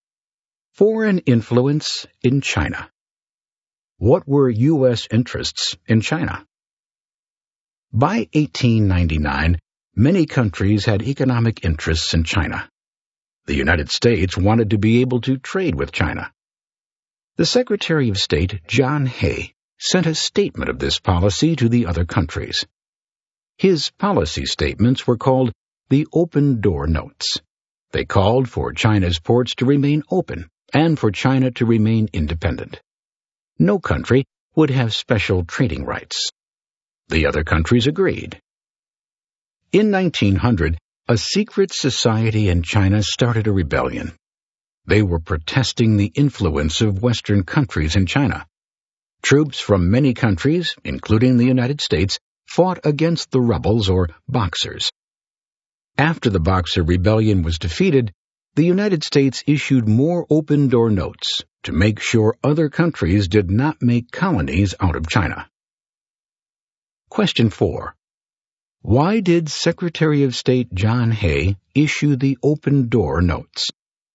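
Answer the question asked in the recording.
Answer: So the U.S. could trade with China: China's ports would stay open and no country would get special trading rights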